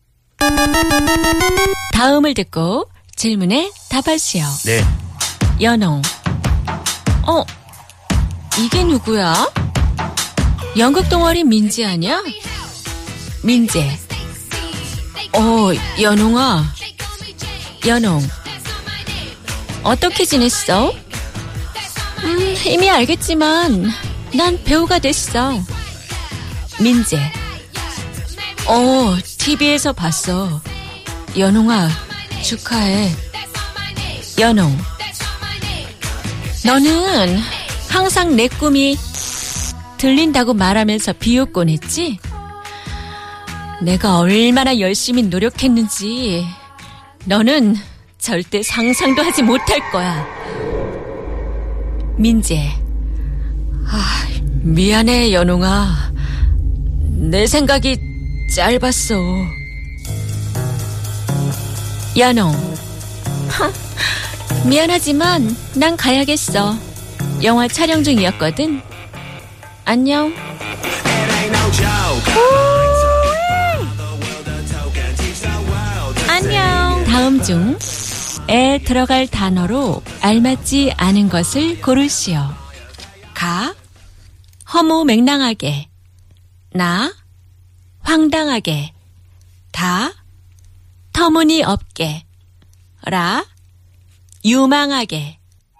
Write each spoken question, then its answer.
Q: 다음 중에 들어갈 단어로 알맞지 않은 것을 고르시오.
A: 라 유망하게, promising.